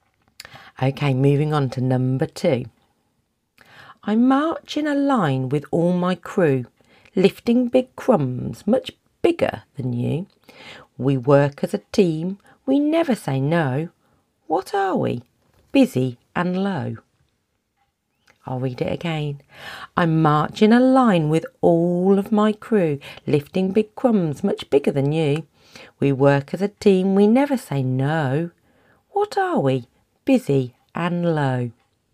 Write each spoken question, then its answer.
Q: What are we? Busy and low.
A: Of course, it's the humble little ant.